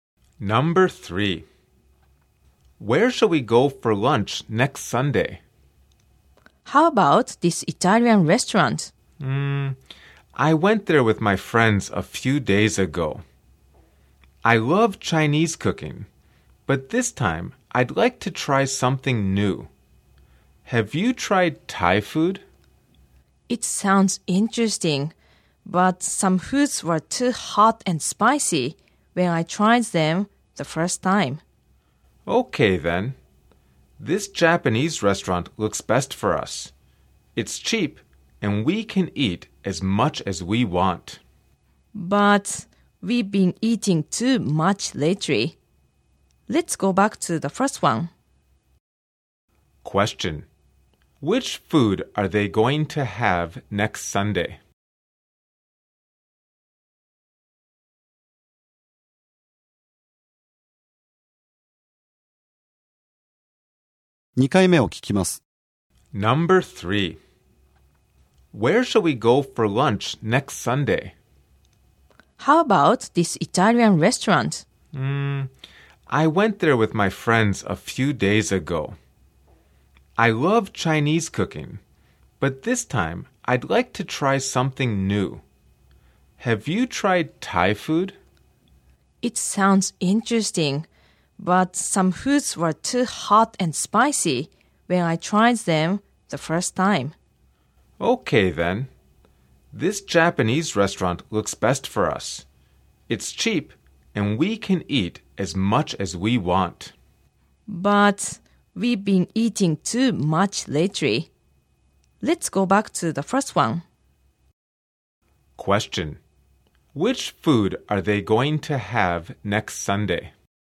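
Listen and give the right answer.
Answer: Italian food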